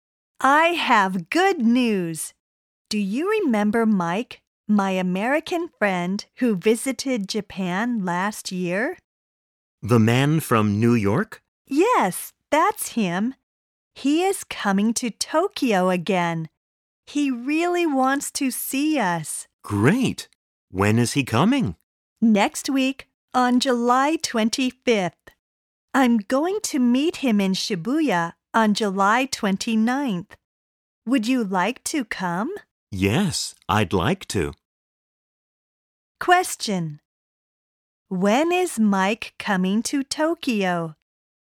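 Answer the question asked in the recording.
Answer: On July 25th (next week)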